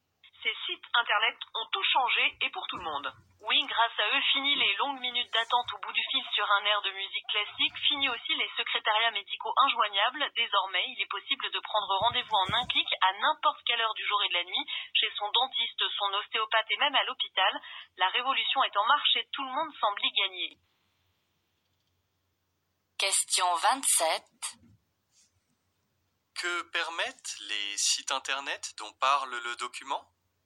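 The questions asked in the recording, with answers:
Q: Que permettent les sites internet dont parle le document ?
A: Prendre rendez-vous médical en ligne en un clic, à toute heure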